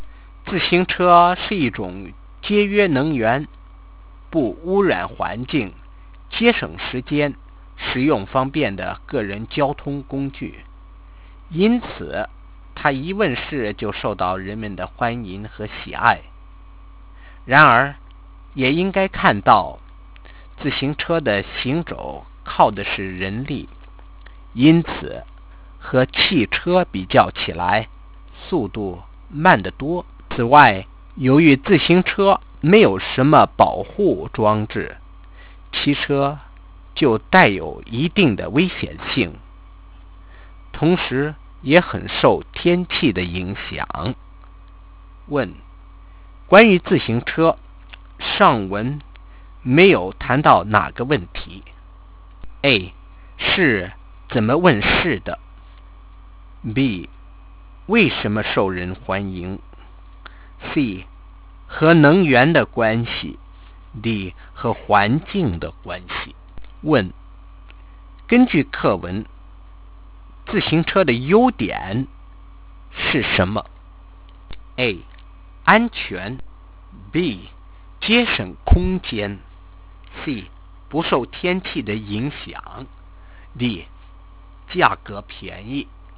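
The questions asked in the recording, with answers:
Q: 关于自行车,上文没有谈到哪个问题。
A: A: 是怎么问世的?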